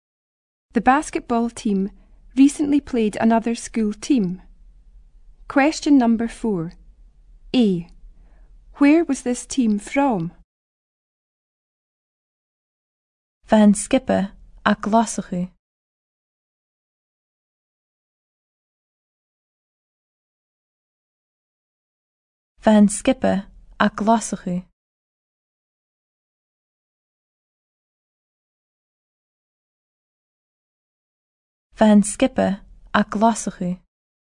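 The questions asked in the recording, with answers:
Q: Where was this team from?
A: Glasgow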